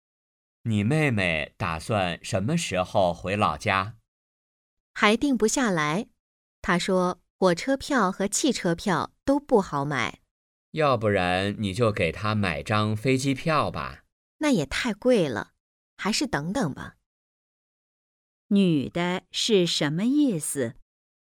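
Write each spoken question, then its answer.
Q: 女的是什么意思?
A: 飞机票太贵,还是再等等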